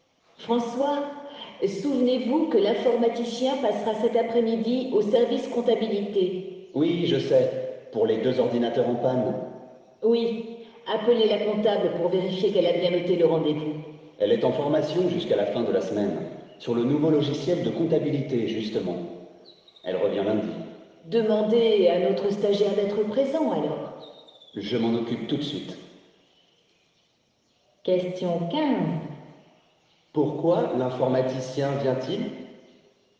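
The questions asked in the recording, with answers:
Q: Pourquoi l'informaticien vient-il?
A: Pour réparer deux ordinateurs en panne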